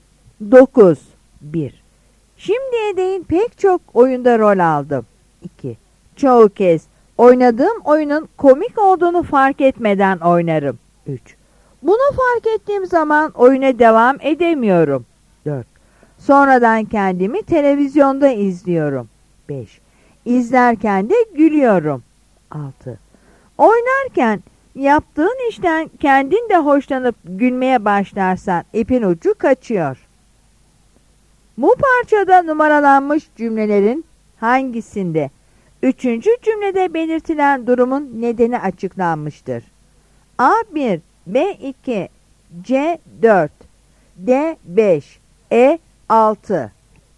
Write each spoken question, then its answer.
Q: Bu parçada numaralanmış cümlelerin hangisinde?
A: Yanıt E'dir.